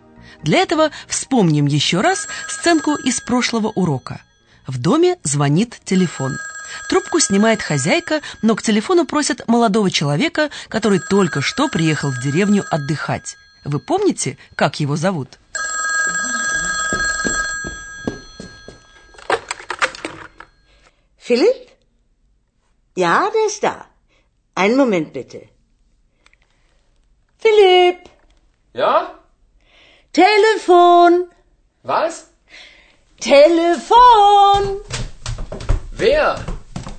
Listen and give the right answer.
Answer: Молодого человека зовут Филиппом.